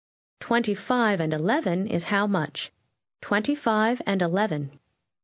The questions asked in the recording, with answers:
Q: 25 and 11 is how much? 25 and 11.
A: 36.